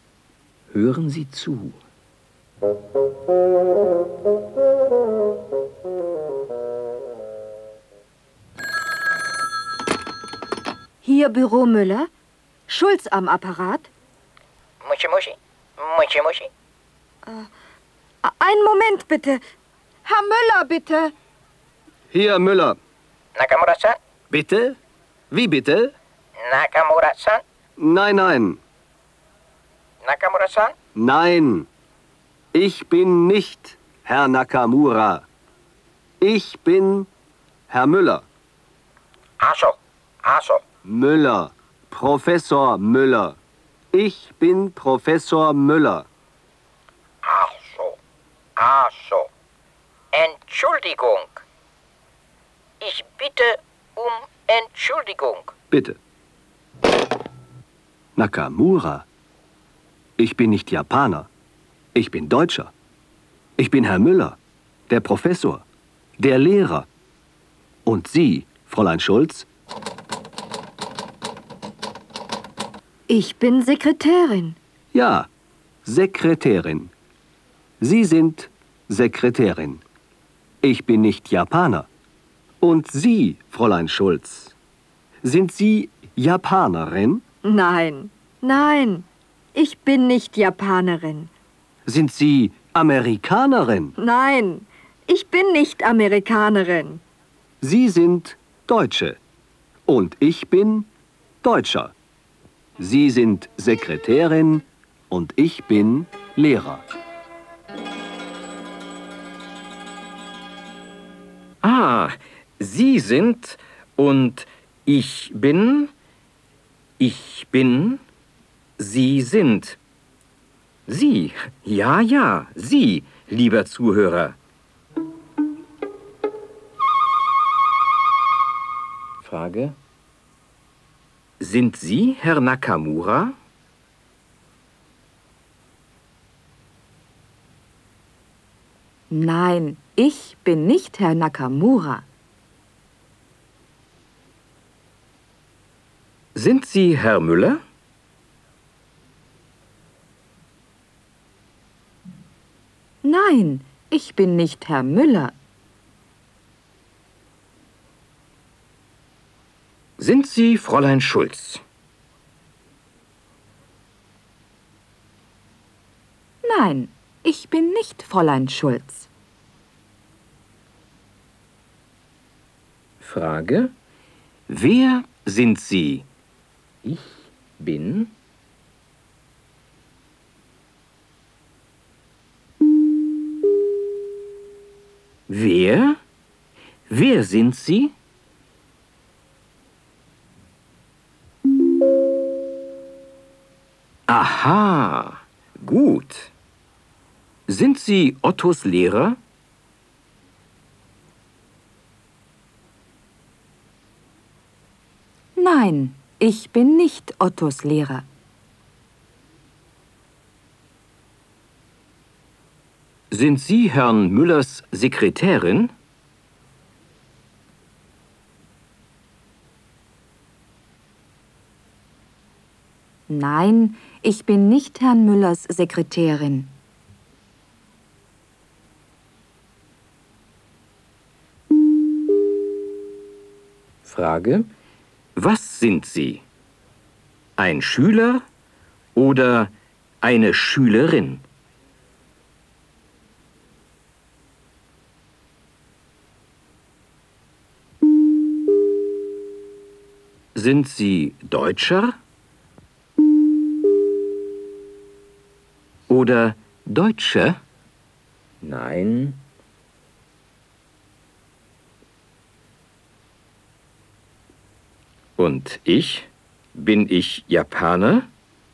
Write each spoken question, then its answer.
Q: Und ich? Bin ich Japaner?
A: Nein, Sie sind nicht Japaner.